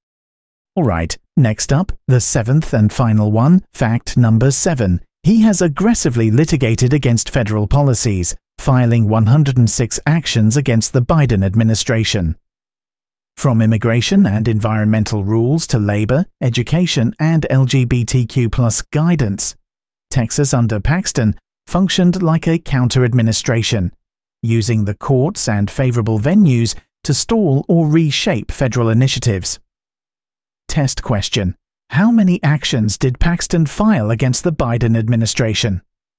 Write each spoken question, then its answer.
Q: how many actions did Paxton file against the Biden administration?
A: 106.